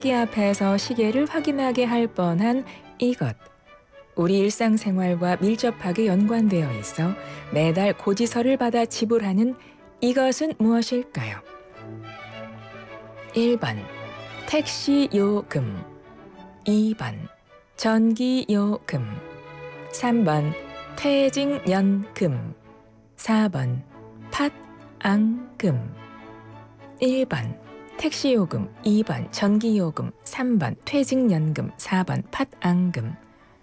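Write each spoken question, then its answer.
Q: 우리 일상생활과 밀접하게 연관되어 있어 매달 고지서를 받아 지불하는 이것은 무엇일까요?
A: 2: 전기요금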